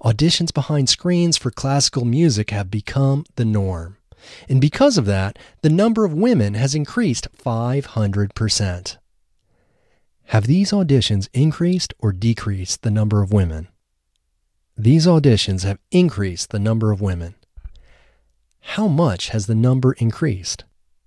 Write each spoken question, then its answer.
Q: How much has the number increased?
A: The number has increased 500%.